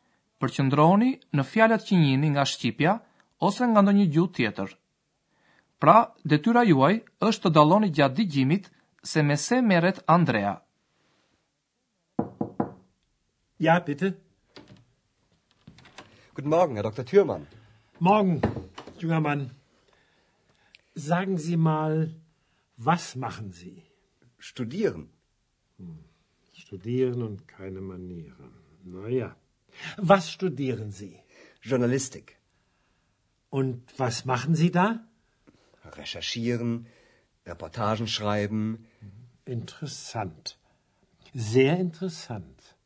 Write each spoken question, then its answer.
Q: Pra, detyra juaj është të dalloni gjatë digjimit se me se meret Andrea.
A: Me siguri e fiksuat që Andrea vazhdon studimet për gazetari